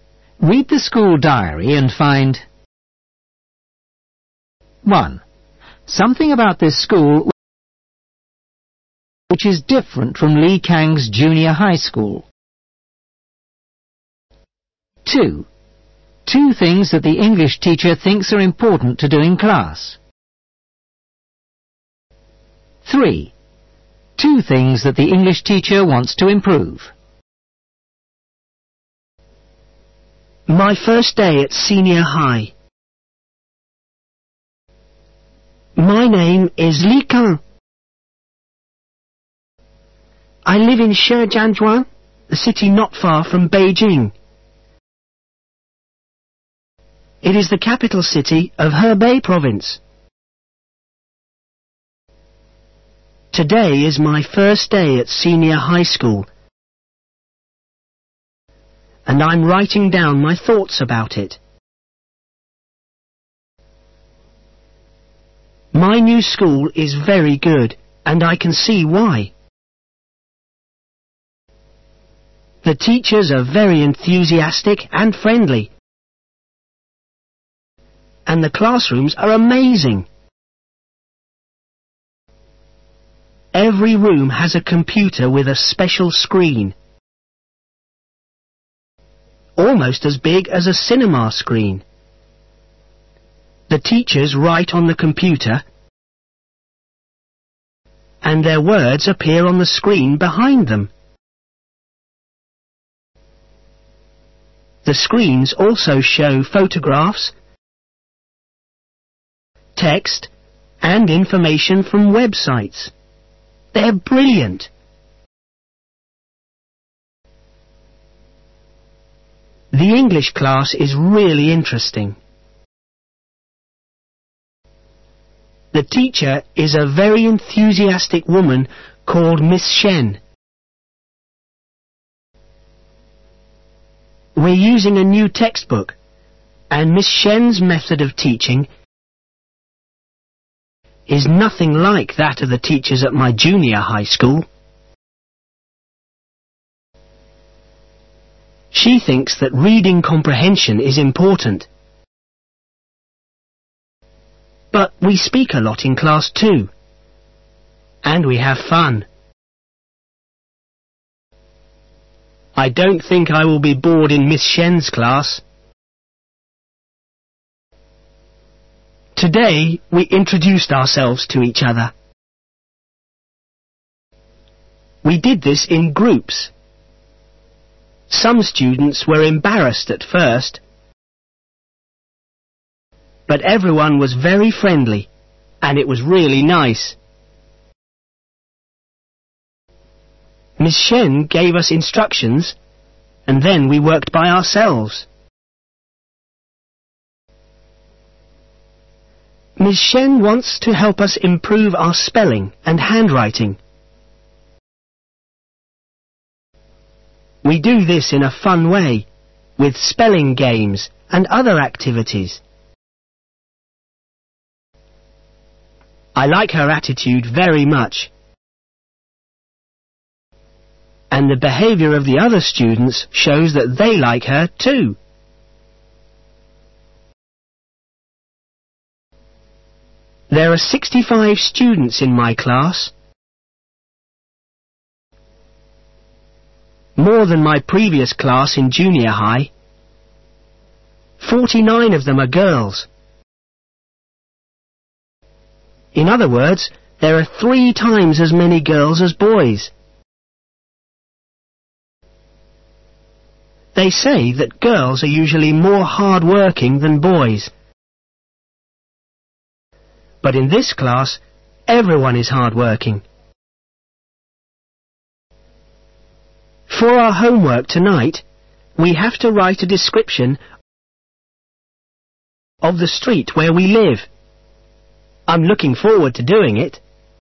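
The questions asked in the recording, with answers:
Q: Two things that the English teacher thinks are important to do in class.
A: Reading comprehension and speaking a lot in class

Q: Two things that the English teacher wants to improve.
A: Spelling and handwriting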